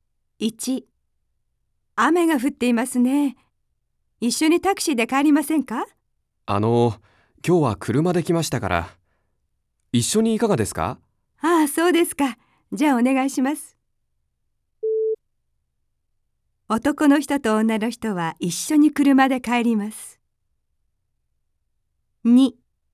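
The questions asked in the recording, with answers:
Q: 男の人と女の人は一緒に車で帰ります。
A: ○(正しい)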